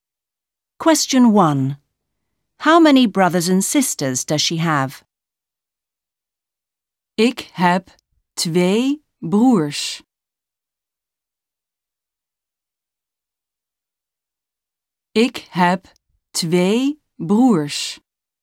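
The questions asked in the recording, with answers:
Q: How many brothers and sisters does she have?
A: Two brothers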